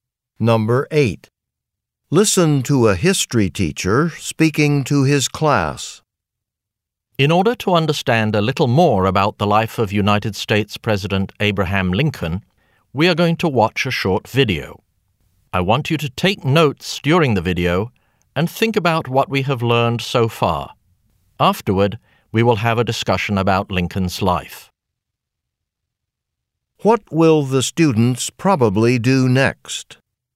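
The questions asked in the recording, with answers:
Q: What will the students probably do next?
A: Watch a video about Lincoln and take notes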